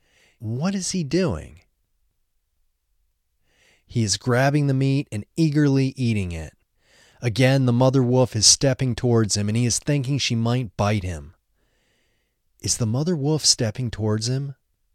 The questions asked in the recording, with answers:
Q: Is the mother wolf stepping towards him?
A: Yes, the mother wolf is stepping towards him.